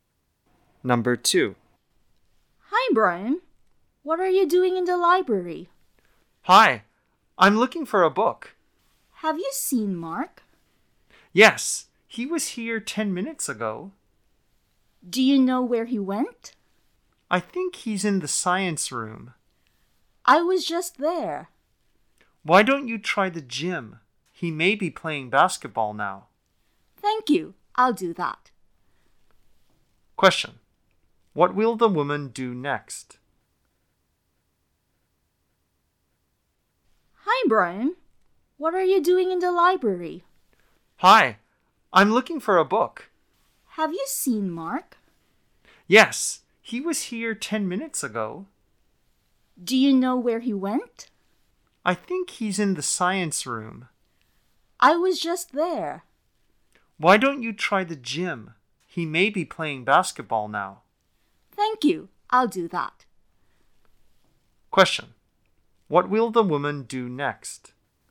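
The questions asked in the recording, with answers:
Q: What will the woman do next?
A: She will go to the gym to look for Mark.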